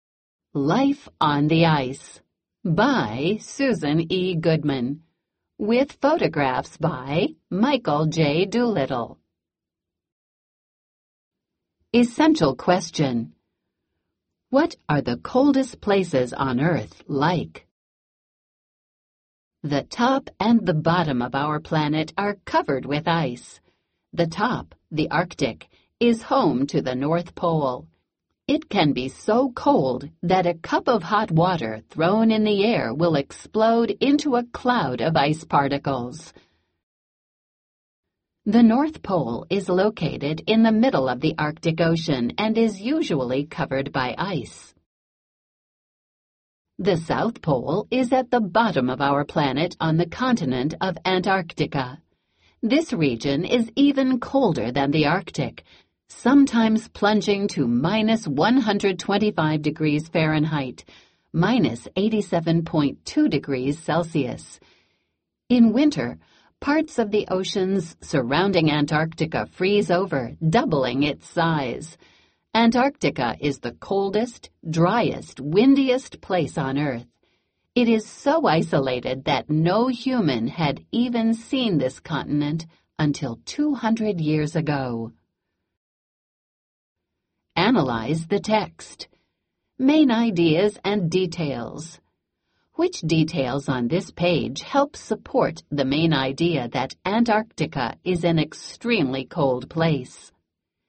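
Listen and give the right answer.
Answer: It can drop to minus 125 degrees Fahrenheit (minus 87.2 °C), it is colder than the Arctic, and it is the coldest, driest, windiest place on Earth.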